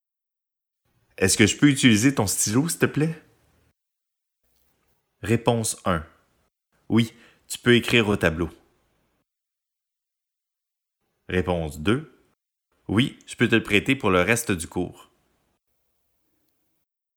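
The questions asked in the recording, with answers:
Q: Est-ce que je peux utiliser ton stylo, s'il te plaît?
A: 2: Oui, je peux te le prêter pour le reste du cours.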